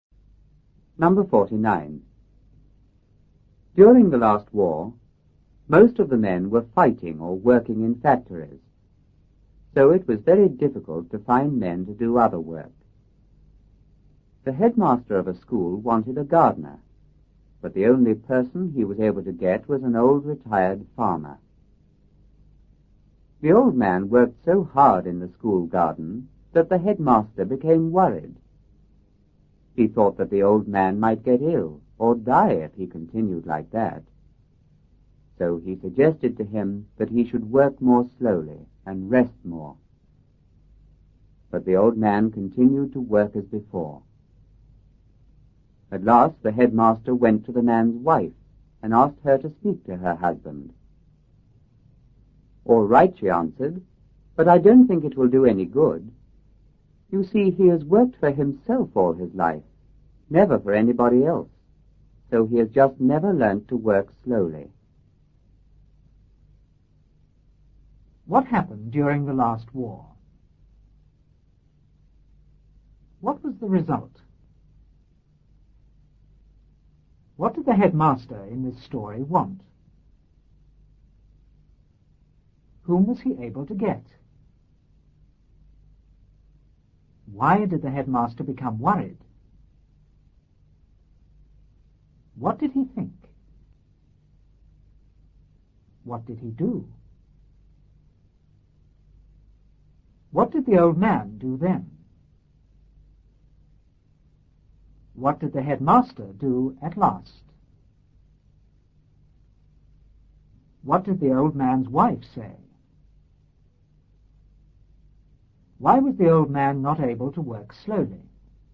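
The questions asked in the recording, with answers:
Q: What happened during the last war?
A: Most men were fighting or working in factories

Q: What was the result?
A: It was very difficult to find men to do other work

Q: What did the headmaster in this story want?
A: A gardener

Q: Whom was he able to get?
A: An old retired farmer

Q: Why did the headmaster become worried?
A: The old man worked so hard in the garden

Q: What did he think?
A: The old man might get ill or die if he continued like that

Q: What did he do?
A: Suggested he work more slowly and rest more

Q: What did the old man do then?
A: Continued to work as before

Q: What did the headmaster do at last?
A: Went to the man's wife and asked her to speak to her husband

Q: What did the old man's wife say?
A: All right, but she didn't think it would do any good

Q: Why was the old man not able to work slowly?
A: He had always worked for himself, never for anybody else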